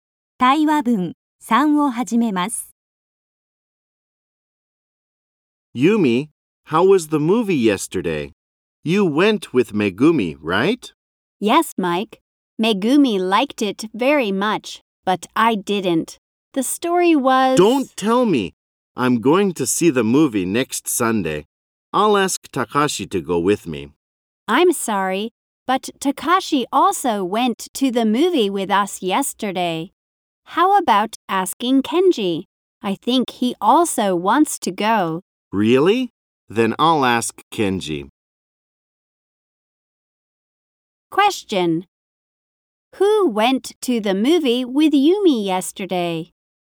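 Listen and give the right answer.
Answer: Megumi and Takashi.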